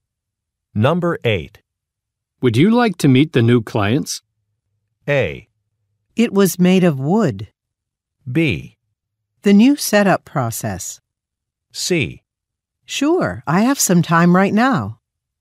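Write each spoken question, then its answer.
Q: Would you like to meet the new clients?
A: C: Sure, I have some time right now.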